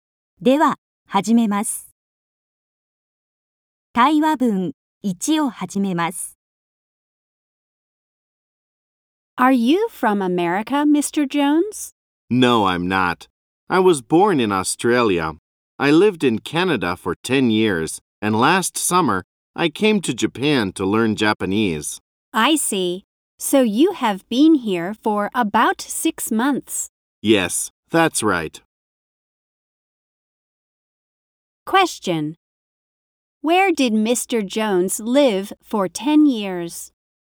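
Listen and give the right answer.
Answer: In Canada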